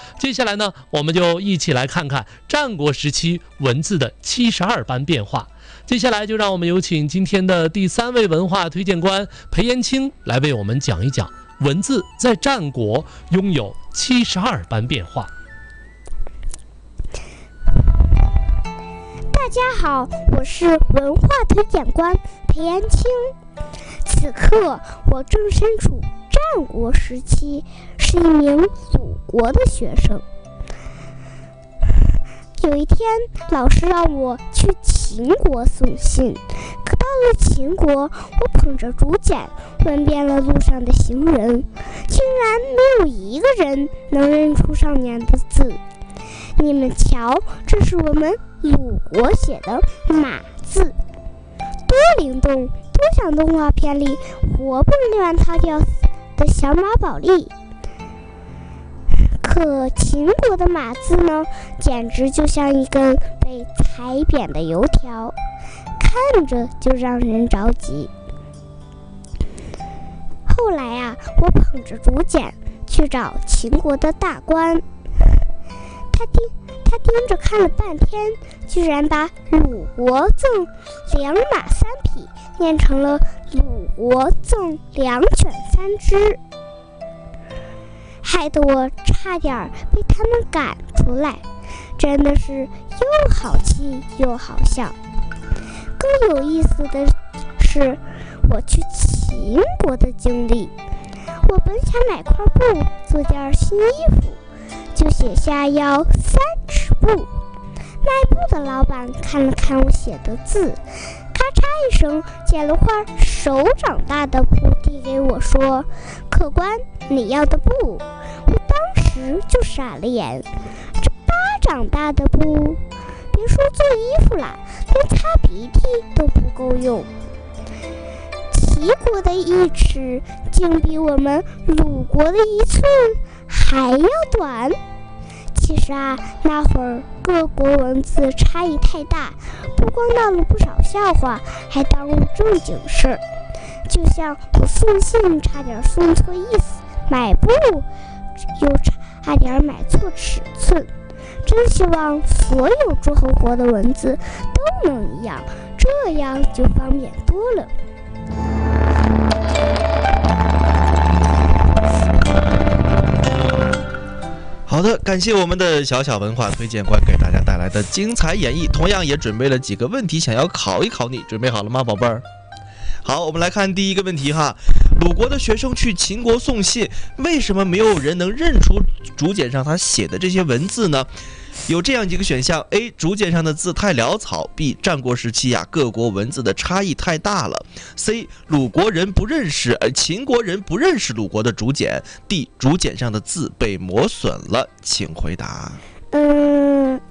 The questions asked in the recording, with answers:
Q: 鲁国的学生去秦国送信,为什么没有人能认出竹简上他写的这些文字呢?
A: 第二个,战国时期各国的文字差异太大了,对不对?